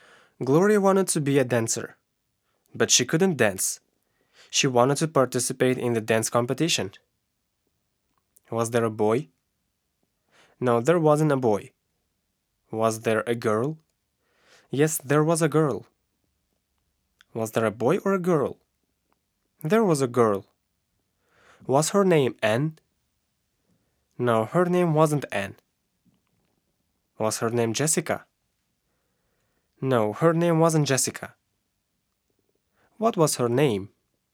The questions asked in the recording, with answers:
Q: What was her name?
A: Her name was Gloria.